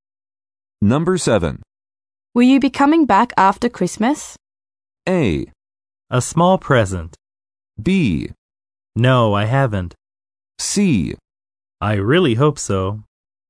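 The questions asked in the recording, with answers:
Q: Will you be coming back after Christmas?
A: C: I really hope so.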